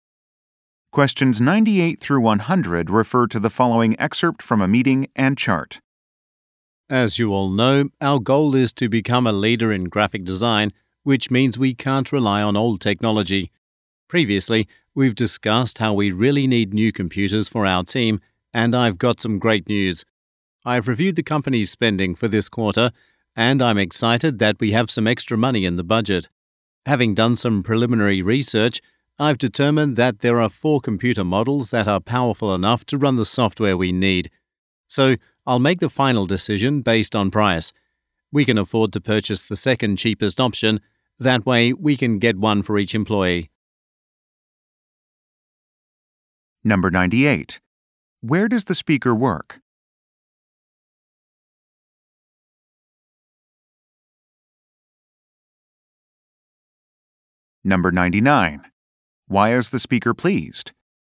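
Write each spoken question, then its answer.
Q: Where does the speaker work?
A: At a graphic design company

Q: Why is the speaker pleased?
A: There is extra money in the budget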